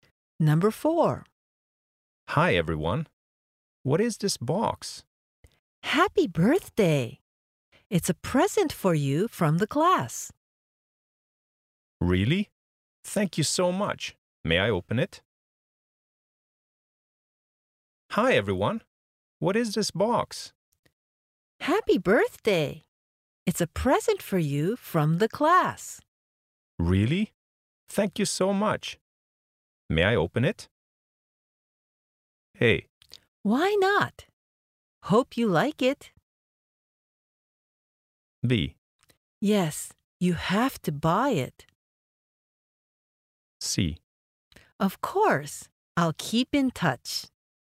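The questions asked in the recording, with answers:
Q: May I open it?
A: A: Why not? Hope you like it.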